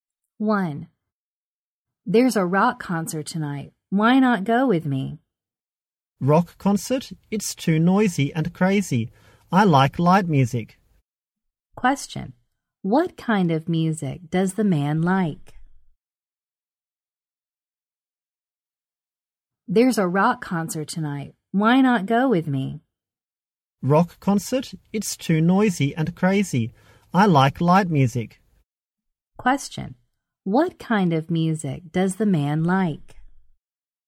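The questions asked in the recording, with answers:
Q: What kind of music does the man like?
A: Light music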